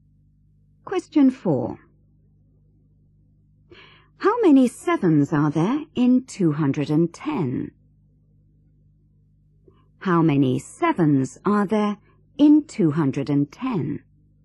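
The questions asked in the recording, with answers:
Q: How many sevens are there in 210?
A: 30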